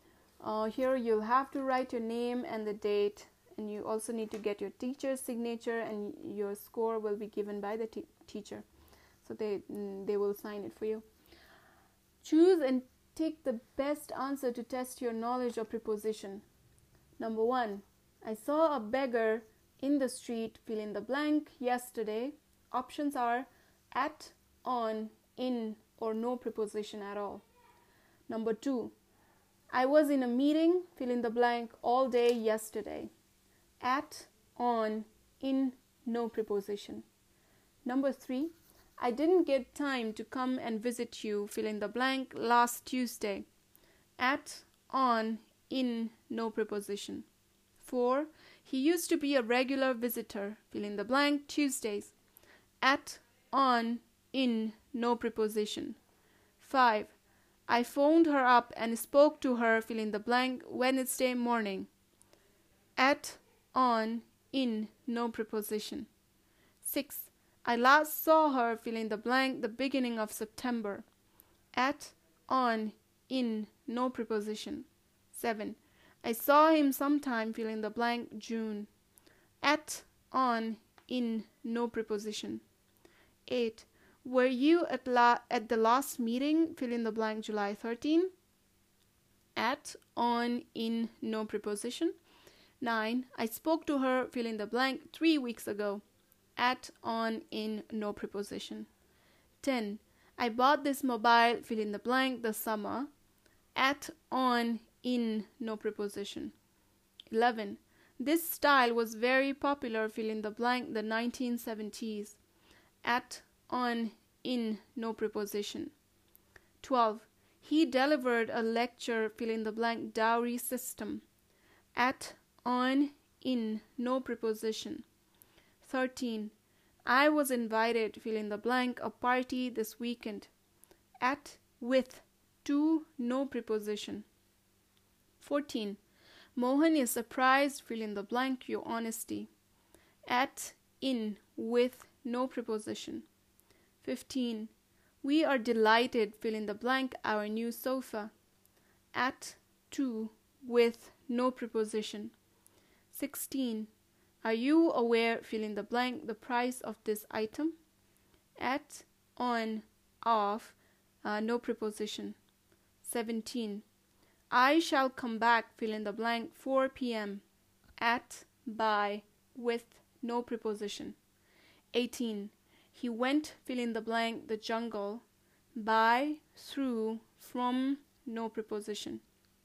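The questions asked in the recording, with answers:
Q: number 1 i saw a beggar in the street fill in the blank yesterday options are at on in or no preposition at all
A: D: no preposition

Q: number 2 I was in a meeting, fill in the blank, all day yesterday.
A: D: no preposition

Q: Number three, I didn't get time to come and visit you, fill in the blank, last Tuesday.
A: D: no preposition

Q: Four, he used to be a regular visitor, fill in the blank, Tuesdays.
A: B: on

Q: Five, I phoned her up and spoke to her, fill in the blank, Wednesday morning.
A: B: on

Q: 6. I last saw her, fill in the blank, the beginning of September.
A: A: at

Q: 7. I saw him sometime, fill in the blank, June.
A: C: in

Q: 8. Were you at, la- at the last meeting, fill in the blank, July 13?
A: B: on

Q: 9. I spoke to her, fill in the blank, three weeks ago.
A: D: no preposition

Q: 10. I bought this mobile, fill in the blank, the summer.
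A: C: in

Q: 11. This style was very popular, fill in the blank, the 1970s.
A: C: in

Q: 12. He delivered a lecture fill in the blank dowry system at, on, in no preposition.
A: B: on

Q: 13. I was invited fill in the blank a party this weekend at, with, to no preposition.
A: C: to

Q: 14. Mohan is surprised fill in the blank your honesty at, in, with no preposition.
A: A: at

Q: 15. We are delighted fill in the blank our new sofa.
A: C: with

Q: 17. I shall come back fill in the blank 4 p.m.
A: B: by

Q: 18. He went, fill in the blank, the jungle, by, through, from, no preposition.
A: B: through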